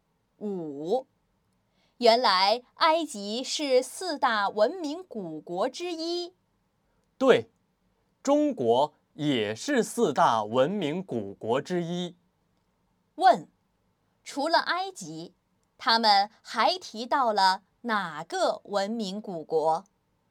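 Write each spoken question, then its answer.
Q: 除了埃及,他们还提到了哪个文明古国?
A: 中国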